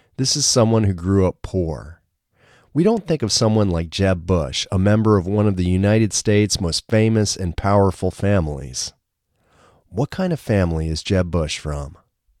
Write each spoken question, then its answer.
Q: What kind of family is Jeb Bush from?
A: Jeb Bush is from one of the United States' most famous and powerful families.